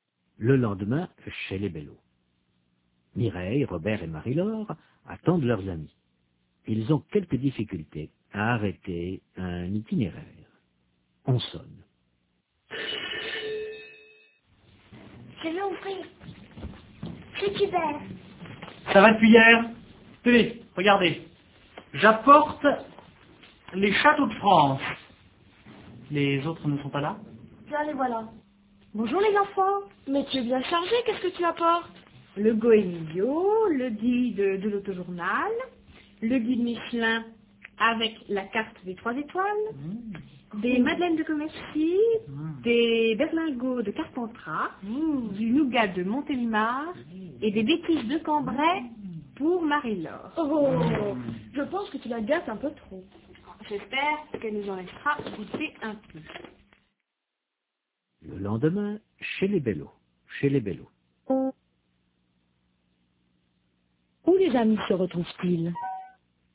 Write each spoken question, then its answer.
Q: Où les amis se retrouvent-ils ?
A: Chez les Bello.